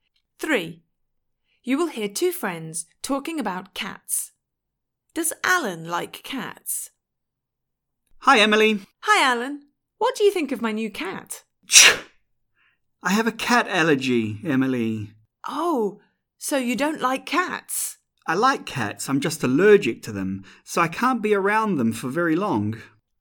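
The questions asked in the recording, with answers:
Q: Does Alan like cats?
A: Yes, but he is allergic to them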